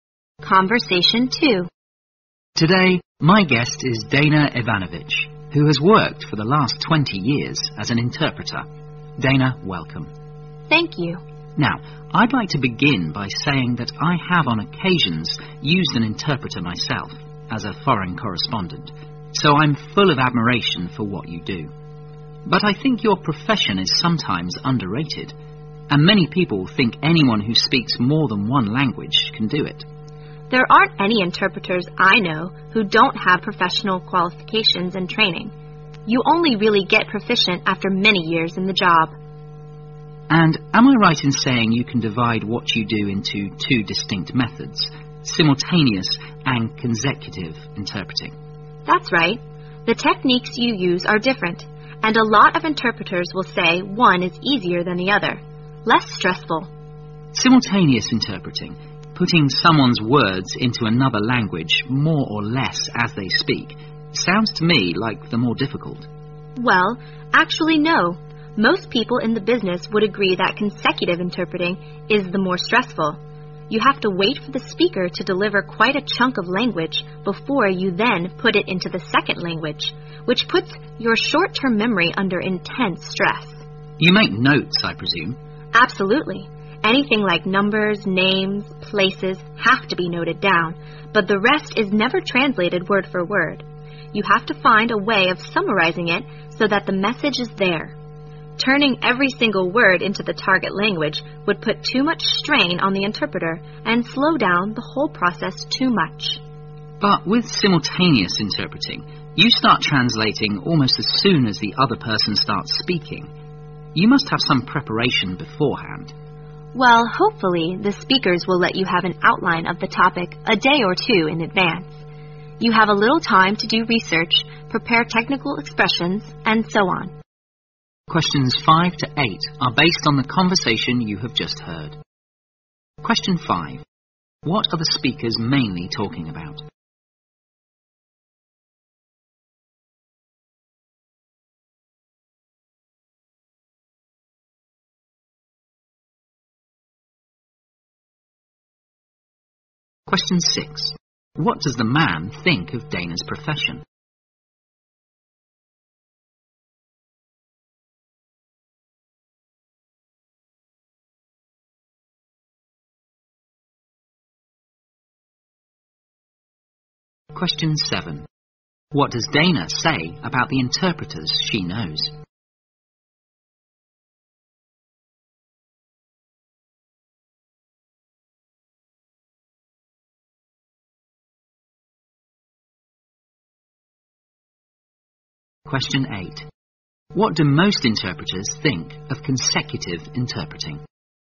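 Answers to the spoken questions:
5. The job of interpreting
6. It is sometimes underrated
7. They all have professional qualifications and training
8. It is the more stressful kind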